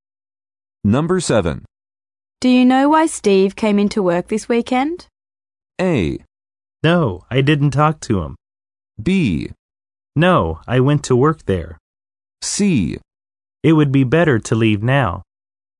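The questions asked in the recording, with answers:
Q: Do you know why Steve came into work this weekend?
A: A: No, I didn't talk to him.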